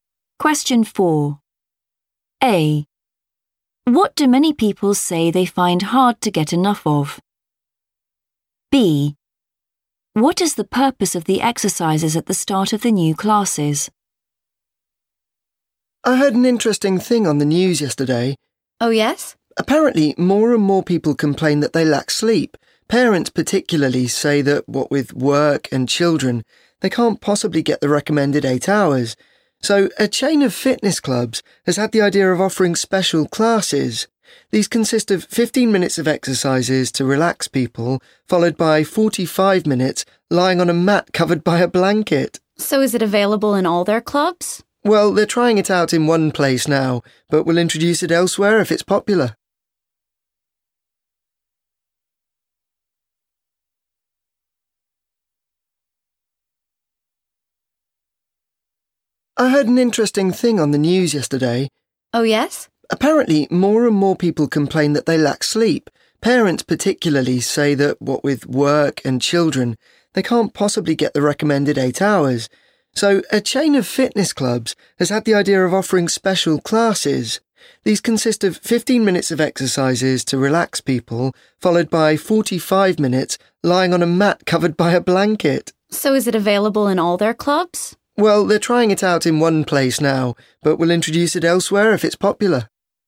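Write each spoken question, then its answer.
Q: What do many people say they find hard to get enough of?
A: sleep

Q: What is the purpose of the exercises at the start of the new classes?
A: to relax people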